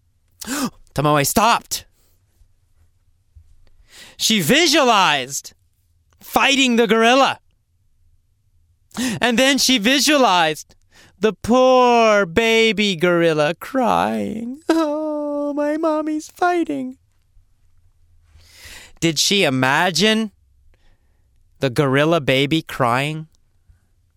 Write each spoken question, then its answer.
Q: Did she imagine the gorilla baby crying?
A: Yes, Tomoe visualized.